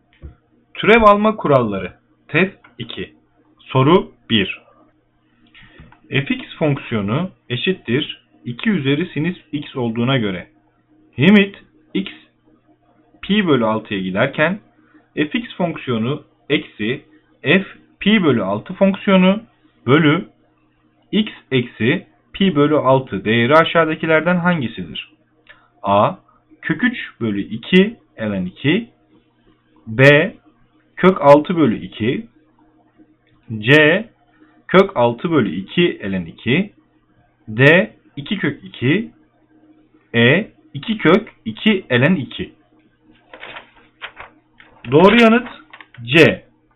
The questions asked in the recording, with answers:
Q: Fx fonksiyonu eşittir 2 üzeri sinüs x olduğuna göre limit x pi bölü 6'ya giderken fx fonksiyonu eksi f pi bölü 6 fonksiyonu bölü x eksi pi bölü 6 değeri aşağıdakilerden hangisidir?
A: Doğru yanıt C.